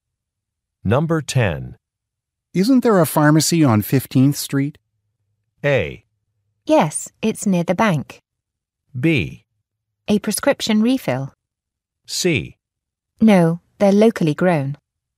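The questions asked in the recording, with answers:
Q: Isn't there a pharmacy on 15th Street?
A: A: Yes, it's near the bank.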